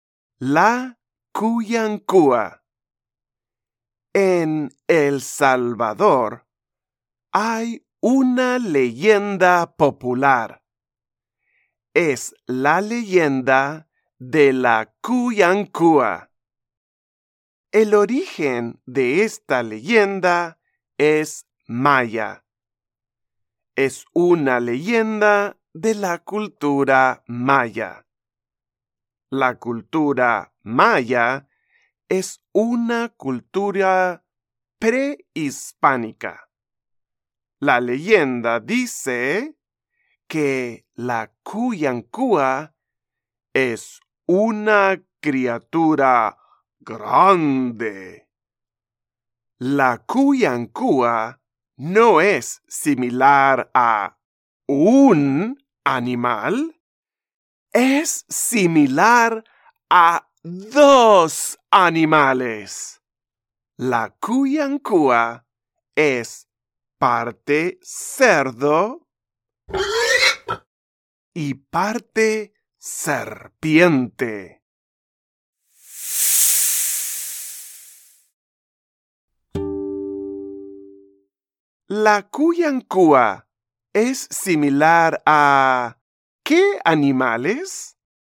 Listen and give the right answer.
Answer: Sí, es similar a un cerdo y a una serpiente.